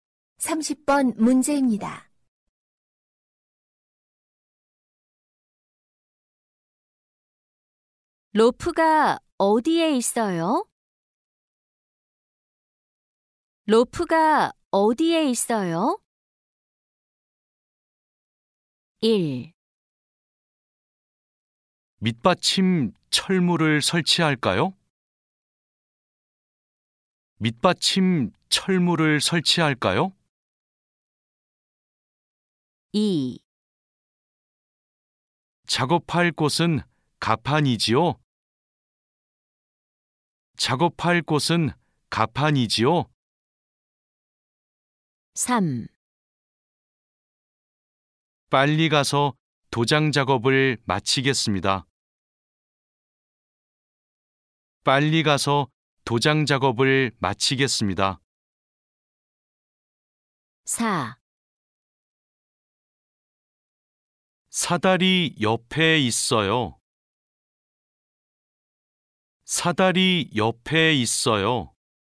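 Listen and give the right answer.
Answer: 4: 사다리 옆에 있어요.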